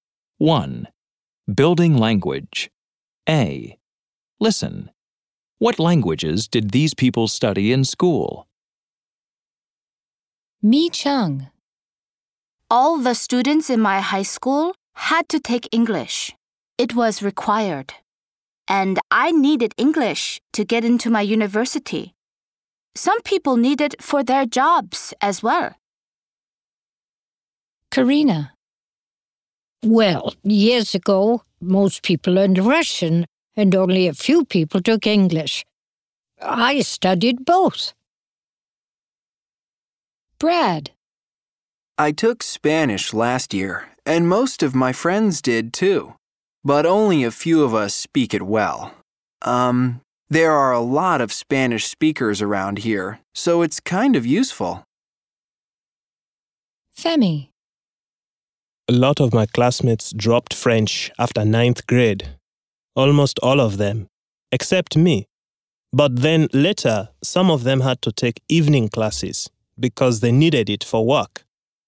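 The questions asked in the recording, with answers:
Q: What languages did these people study in school?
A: Mi Cheng: English; Karina: Russian and English; Brad: Spanish; Femi: French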